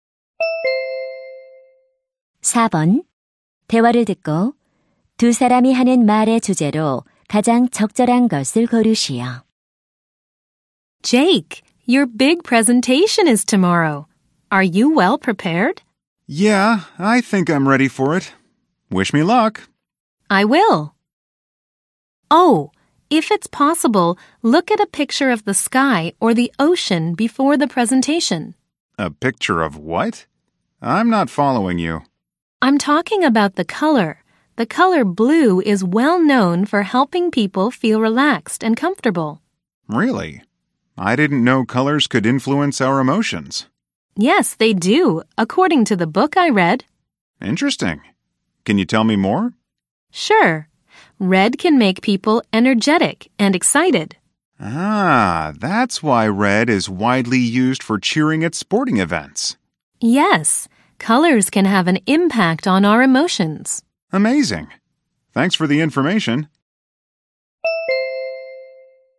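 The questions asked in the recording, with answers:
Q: 대화를 듣고 두 사람이 하는 말의 주제로 가장 적절한 것을 고르시오.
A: 색깔이 감정에 미치는 영향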